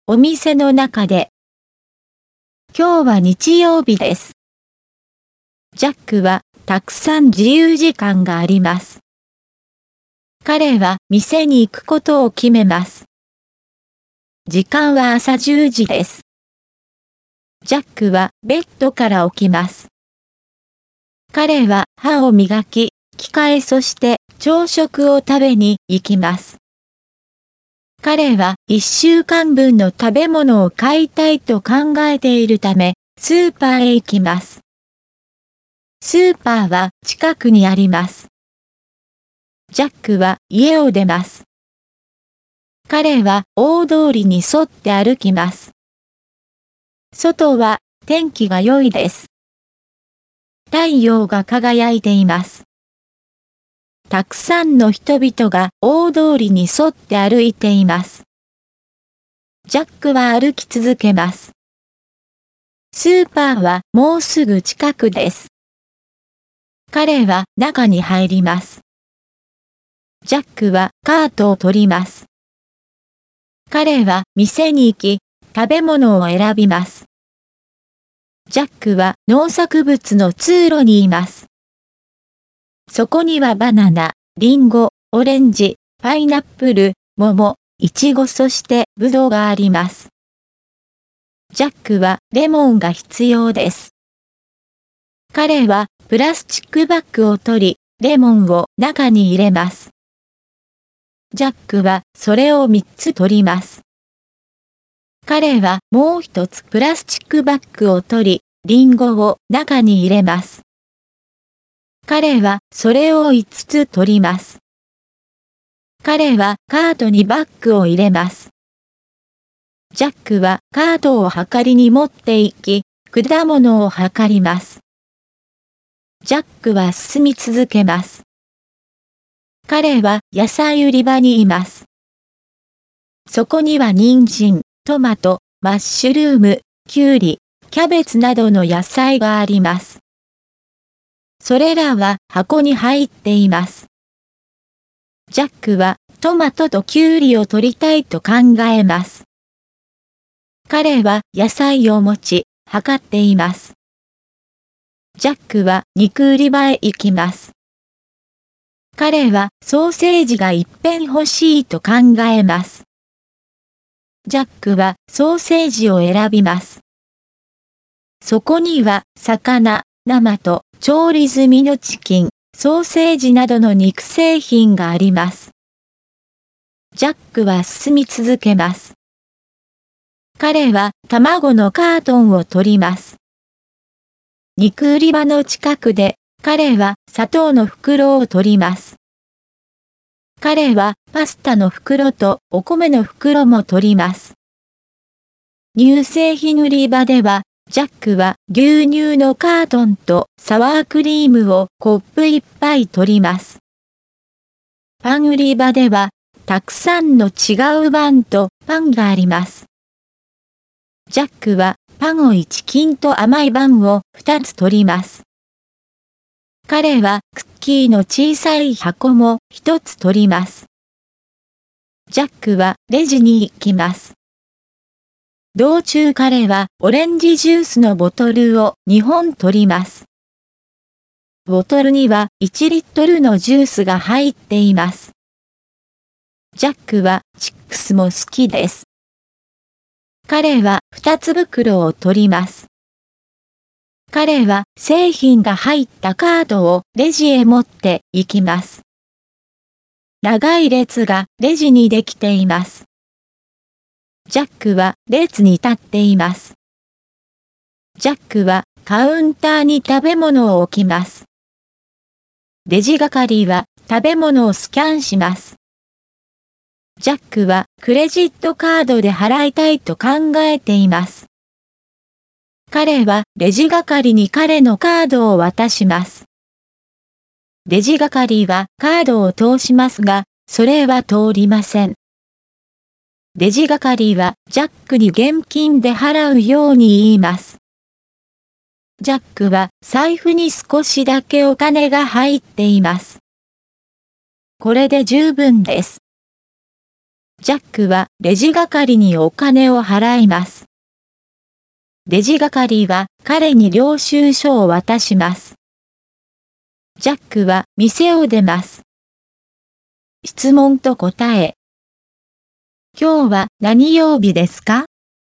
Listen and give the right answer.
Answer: 今日は日曜日です。